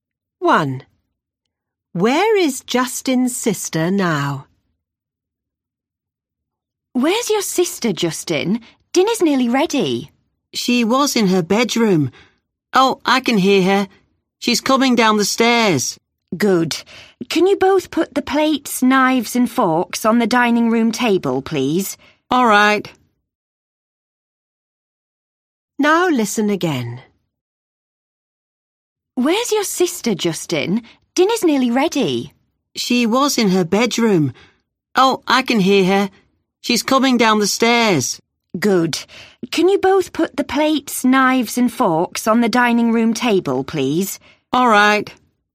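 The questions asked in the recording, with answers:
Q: Where is Justin's sister now?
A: On the stairs (coming down)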